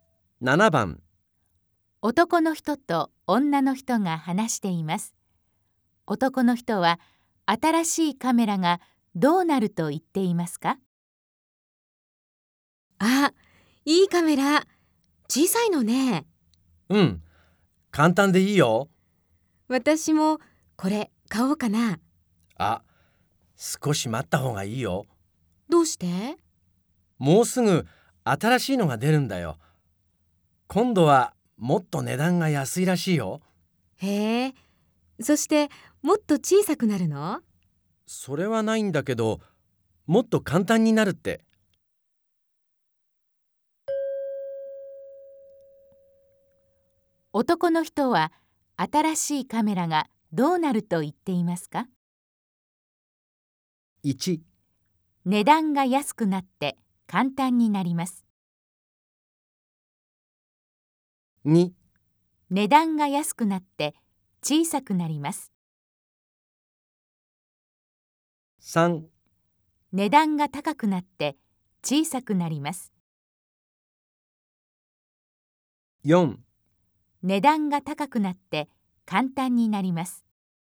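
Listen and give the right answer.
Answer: 1: 値段が安くなって簡単になります。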